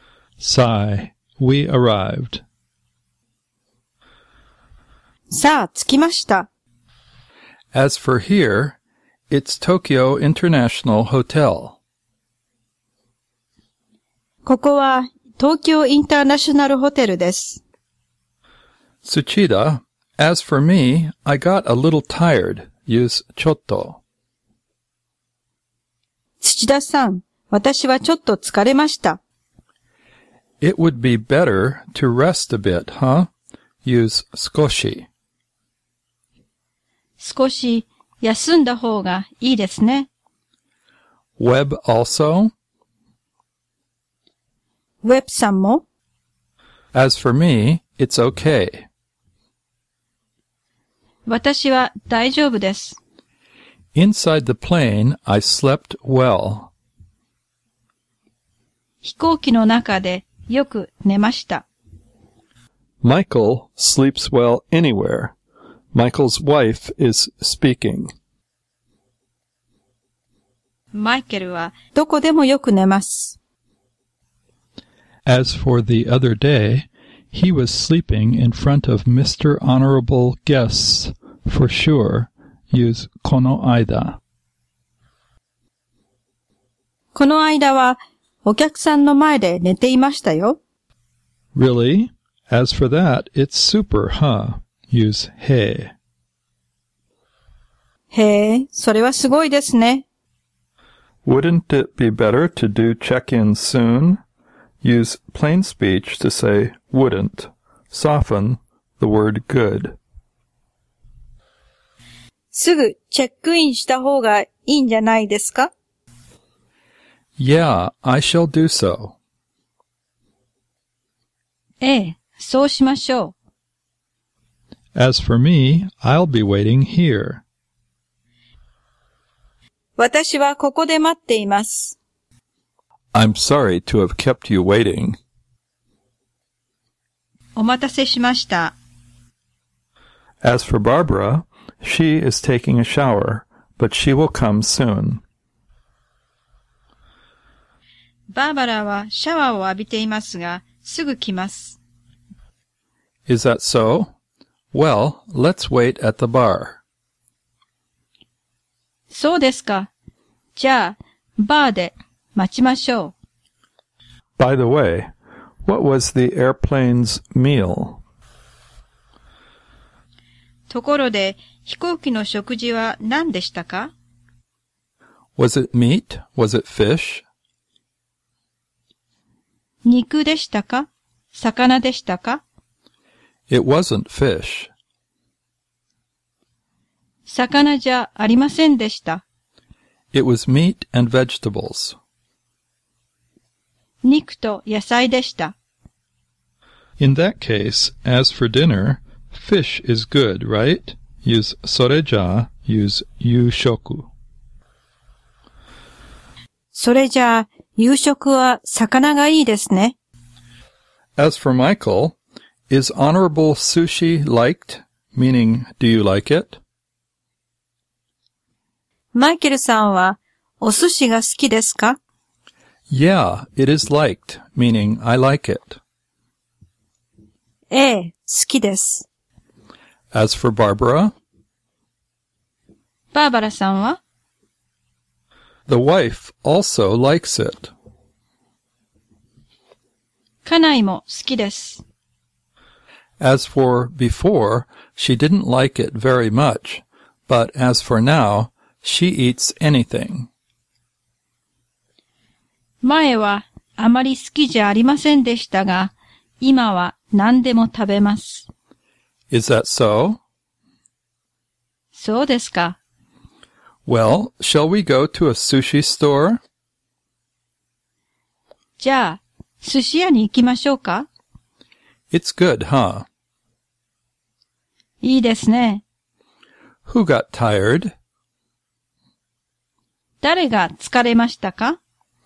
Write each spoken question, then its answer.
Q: 誰が疲れましたか?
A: Barbara got tired.